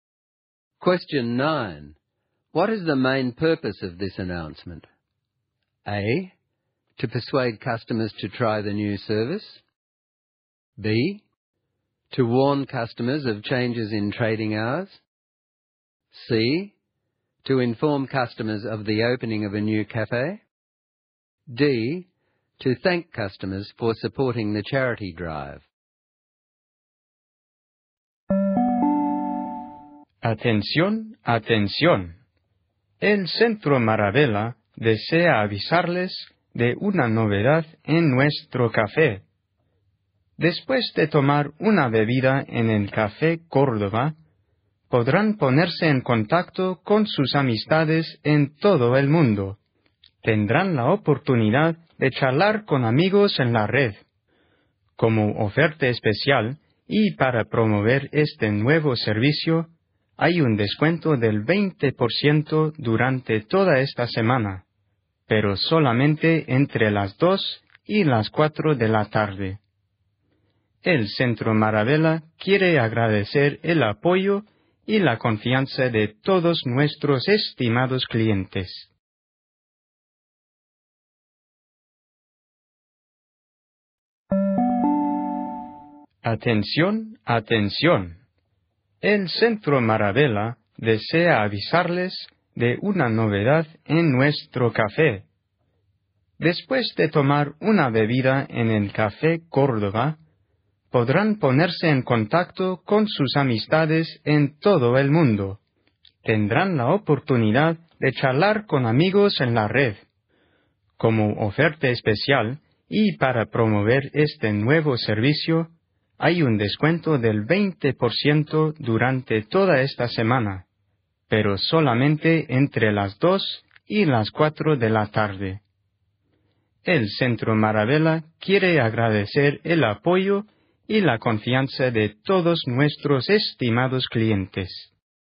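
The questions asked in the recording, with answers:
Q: What is the main purpose of this announcement?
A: A: To persuade customers to try the new service.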